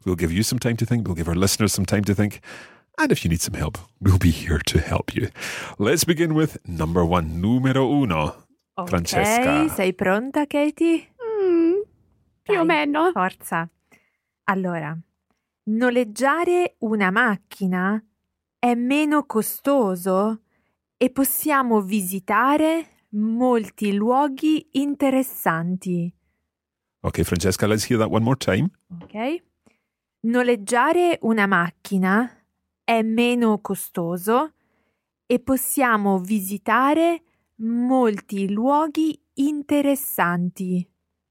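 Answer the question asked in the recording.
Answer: Hiring a car is cheaper and we can visit lots of interesting places.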